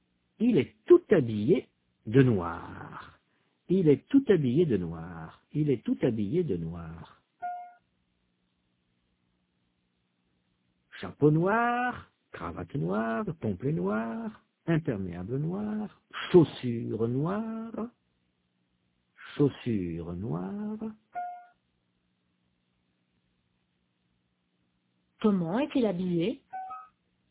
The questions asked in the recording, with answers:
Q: Comment est-il habillé?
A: Il est tout habillé de noir.